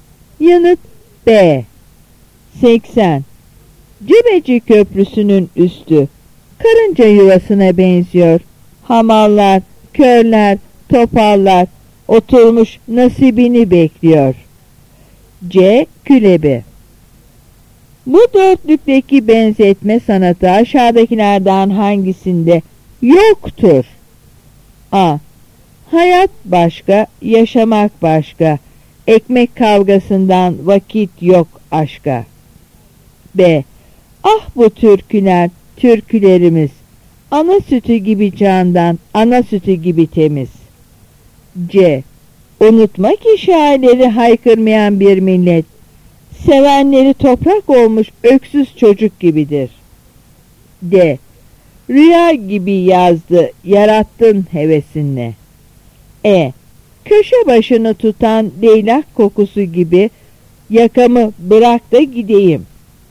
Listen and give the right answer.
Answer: Yanıt A.